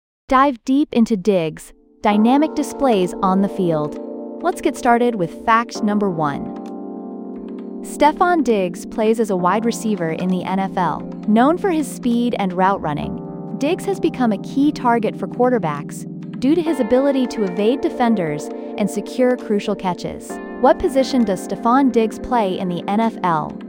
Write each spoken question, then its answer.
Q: What position does Stephon Diggs play in the NFL?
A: Correct answer, wide receiver.